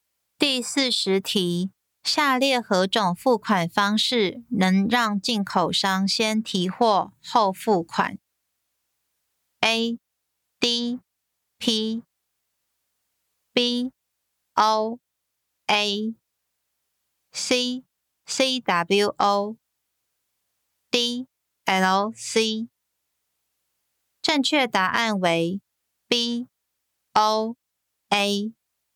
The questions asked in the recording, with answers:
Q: 下列何种付款方式能让进口商先提货后付款 ?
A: 正确答案为 B O A。